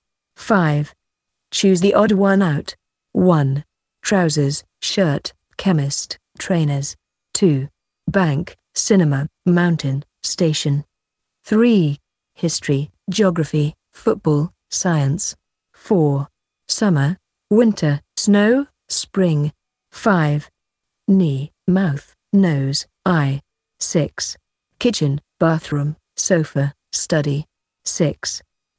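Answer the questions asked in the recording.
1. chemist
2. mountain
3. football
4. snow
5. knee
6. sofa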